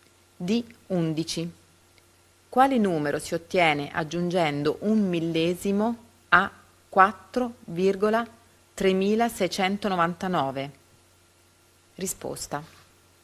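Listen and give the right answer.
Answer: 4,3709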